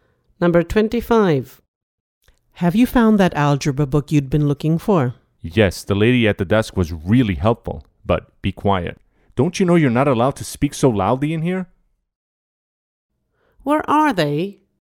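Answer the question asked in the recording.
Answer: in a library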